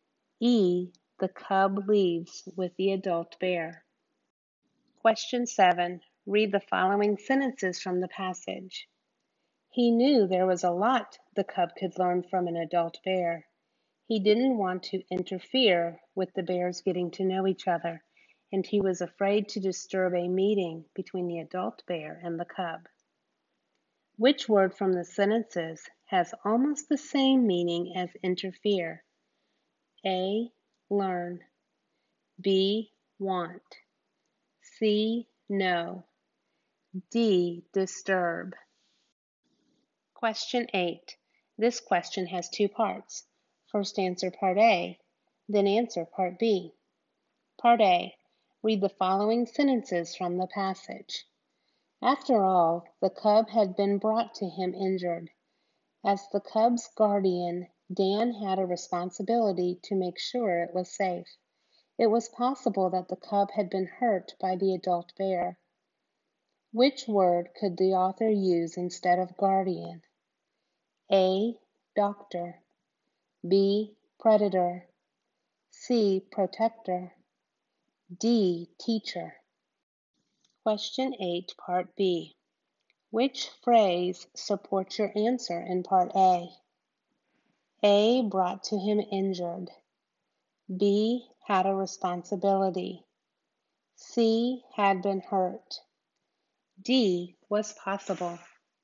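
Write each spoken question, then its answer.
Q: Which word from the sentences has almost the same meaning as interfere?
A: D: Disturb

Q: Which word could the author use instead of guardian?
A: C: Protector

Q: Which phrase supports your answer in Part A?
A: B: Had a responsibility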